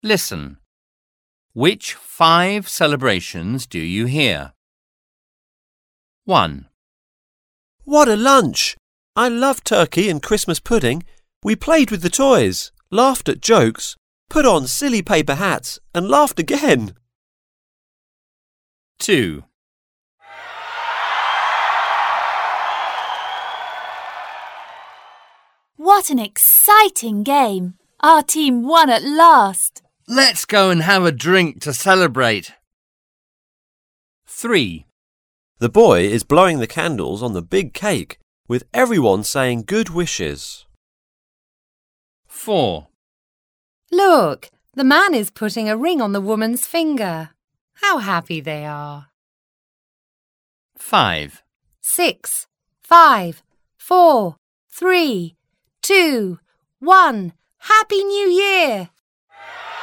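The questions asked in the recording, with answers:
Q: Which five celebrations do you hear?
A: Christmas

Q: Which five celebrations do you hear?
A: A team winning a game

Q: Which five celebrations do you hear?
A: A birthday

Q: Which five celebrations do you hear?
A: A wedding

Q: Which five celebrations do you hear?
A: New Year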